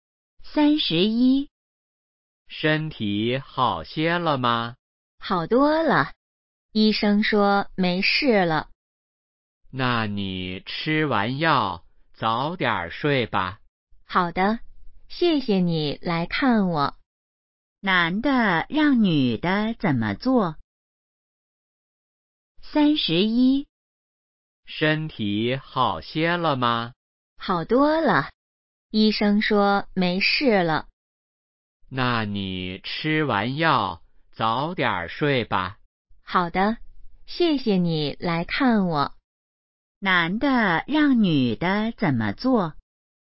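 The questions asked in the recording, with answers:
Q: 男的让女的怎么做?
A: 吃完药早点睡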